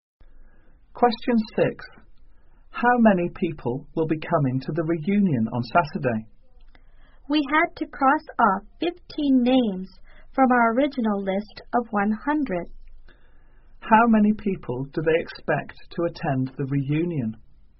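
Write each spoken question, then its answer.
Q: How many people do they expect to attend the reunion?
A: 85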